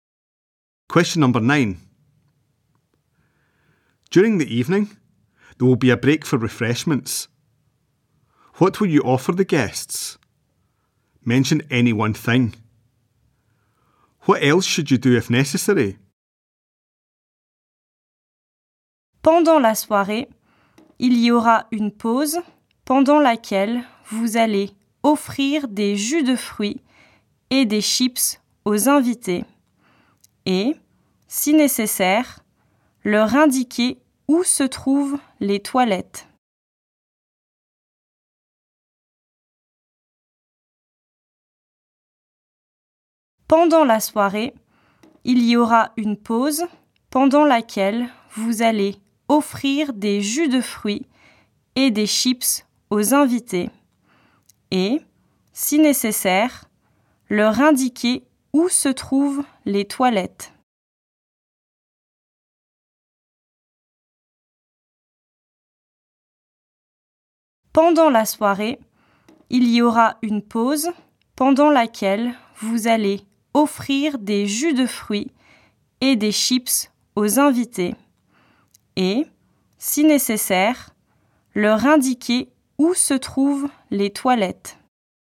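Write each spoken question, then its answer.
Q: What will you offer the guests?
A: Fruit juice or crisps

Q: What else should you do if necessary?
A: Show them where the toilets are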